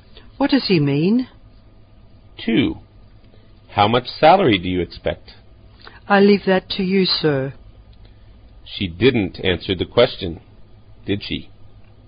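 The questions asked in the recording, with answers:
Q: She didn't answer the question, did she?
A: No, she left the salary up to him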